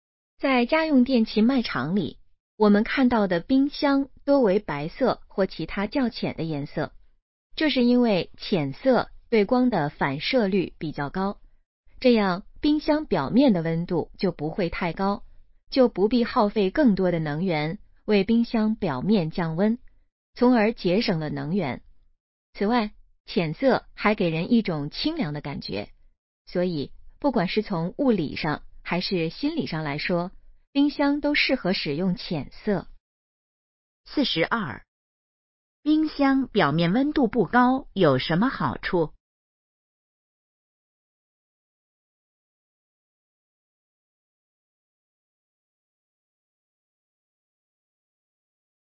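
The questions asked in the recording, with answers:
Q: 冰箱表面温度不高有什么好处?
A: 节省能源

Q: 这段话主要谈的是什么?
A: 冰箱为什么多用浅色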